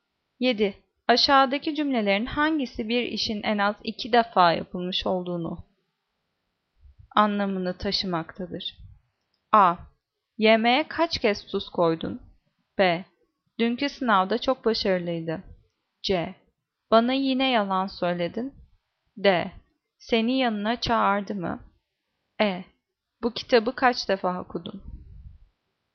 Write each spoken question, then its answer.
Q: Aşağıdaki cümlelerin hangisi bir işin en az iki defa yapılmış olduğunu anlamını taşımaktadır?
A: Cevap C. Bana yine yalan söyledin.